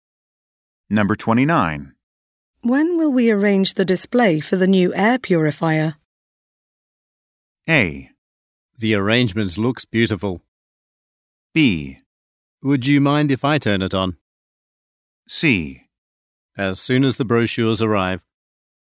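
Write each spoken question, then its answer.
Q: When will we arrange the display for the new air purifier?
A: C: As soon as the brochures arrive.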